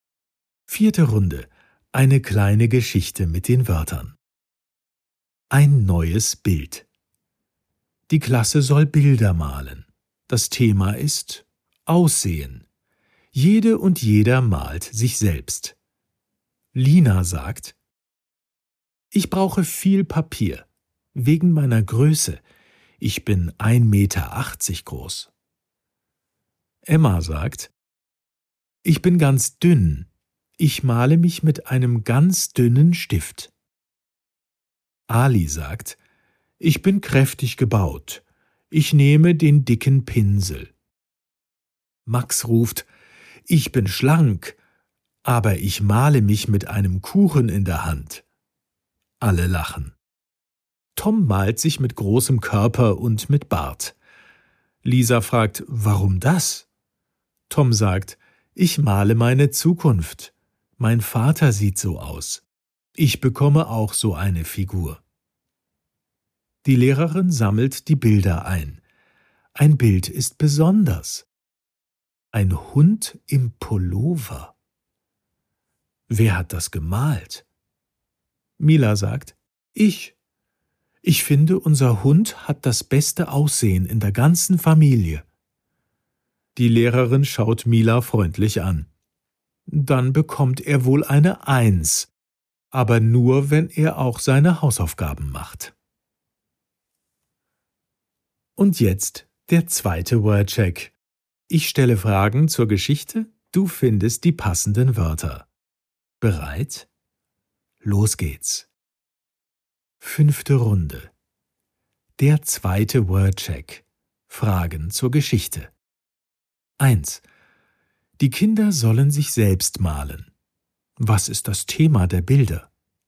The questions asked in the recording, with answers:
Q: Was ist das Thema der Bilder?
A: Das Aussehen.